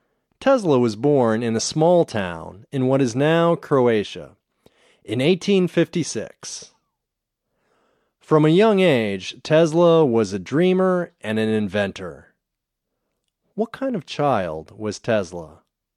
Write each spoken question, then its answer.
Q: What kind of child was Tesla?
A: He was a dreamer and an inventor.